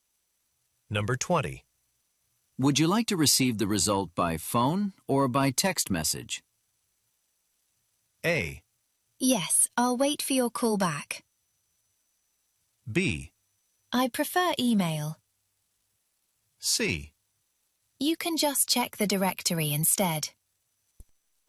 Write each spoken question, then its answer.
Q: Would you like to receive the result by phone or by text message?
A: 이메일도 의도를 정확히 했었던 정답이라고 보실 수 있겠습니다